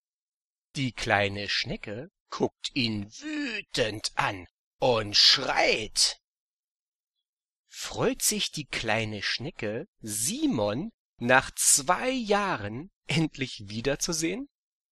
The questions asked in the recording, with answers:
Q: Freut sich die kleine Schnecke, Simon nach 2 Jahren endlich wiederzusehen?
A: Nein, die freut sich nicht.